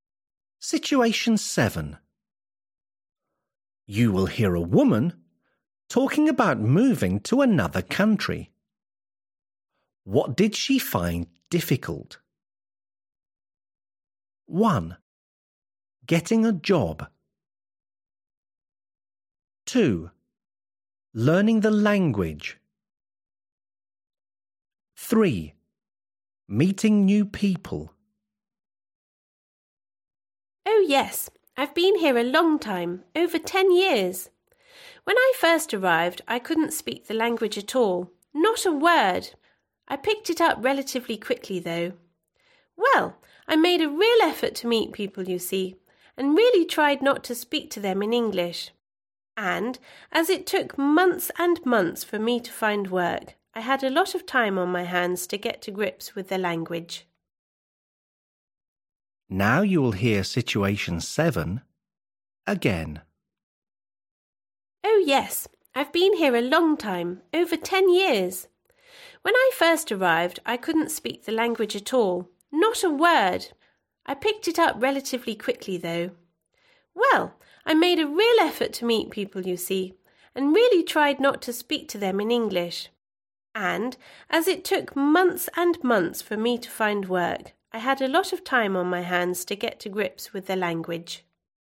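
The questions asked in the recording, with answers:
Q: What did she find difficult?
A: 1: Getting a job.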